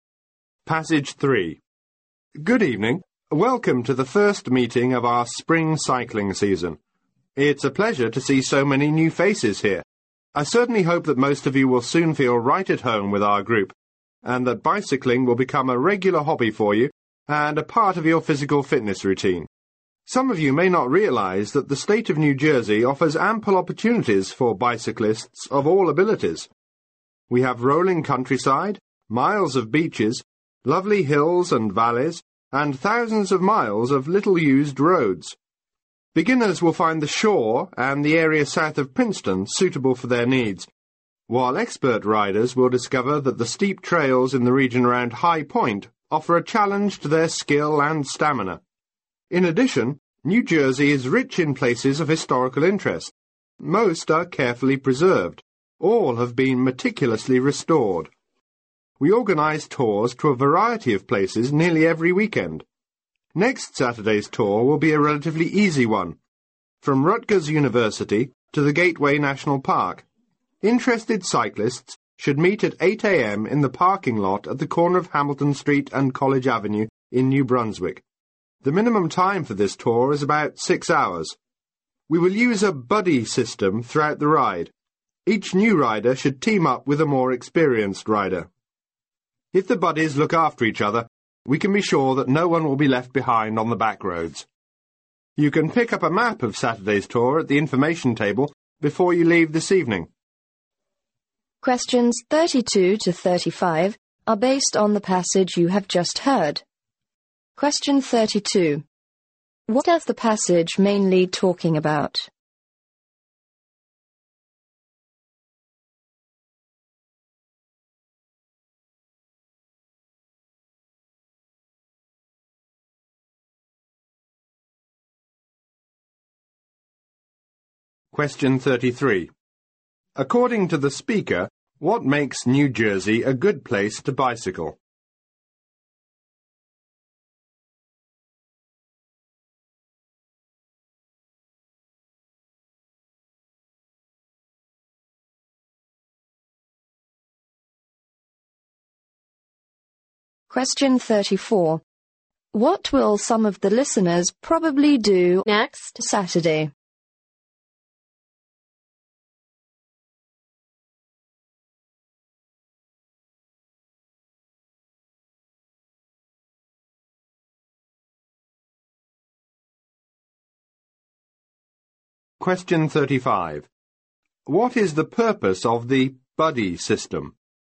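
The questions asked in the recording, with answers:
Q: What will some of the listeners probably do next Saturday?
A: Ride from Rutgers University to Gateway National Park

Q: What is the purpose of the buddy system?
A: To make sure no one is left behind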